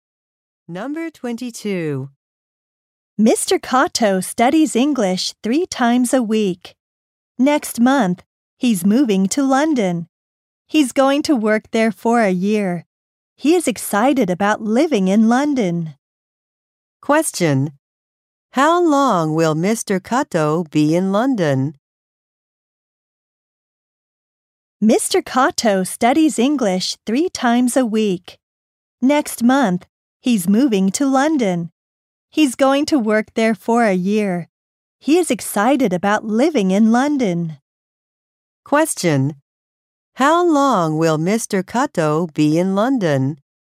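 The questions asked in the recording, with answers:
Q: How long will Mr. Kato be in London?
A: For a year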